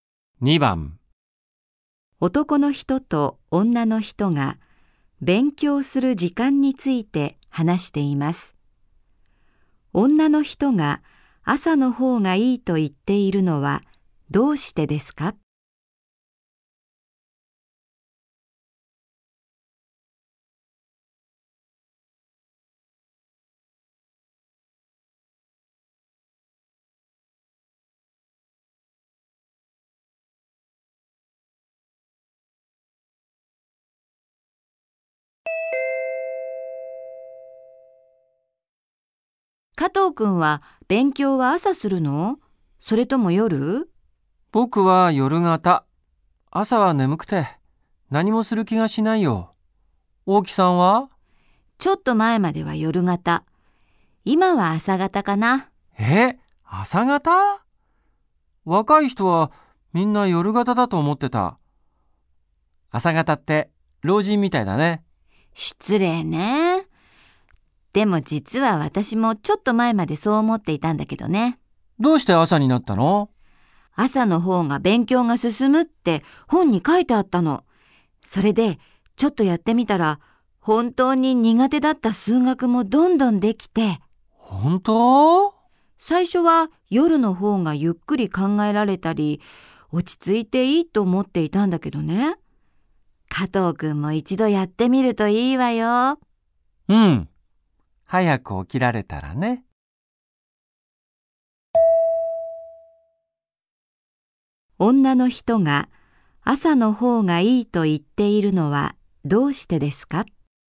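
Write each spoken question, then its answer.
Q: 女の人が朝の方がいいと言っているのはどうしてですか?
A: 朝の方が勉強が進むから(苦手な数学もどんどんできたから)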